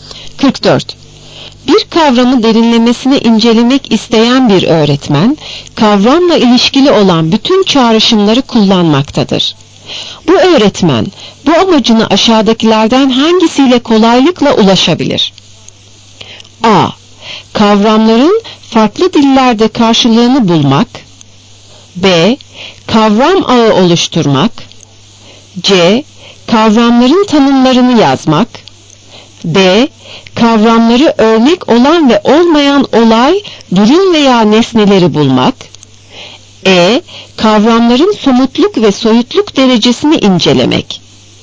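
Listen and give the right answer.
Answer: B: Kavram ağı oluşturmak.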